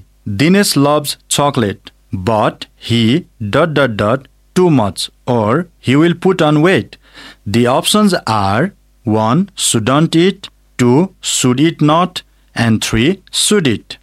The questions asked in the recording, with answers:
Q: Dinesh loves chocolate, but he, dot, dot, dot, too much, or he will put on weight.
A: Shouldn't eat.